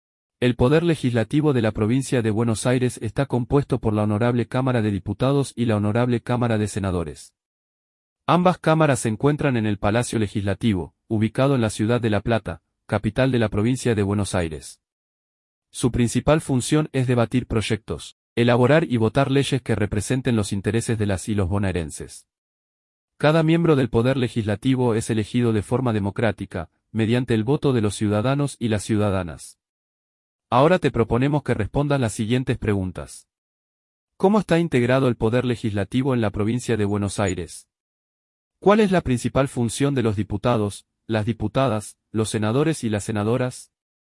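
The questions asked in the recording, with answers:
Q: ¿Cómo está integrado el Poder Legislativo en la Provincia de Buenos Aires?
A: Por la Honorable Cámara de Diputados y la Honorable Cámara de Senadores

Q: ¿Cuál es la principal función de los diputados, las diputadas, los senadores y las senadoras?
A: Debatir proyectos, elaborar y votar leyes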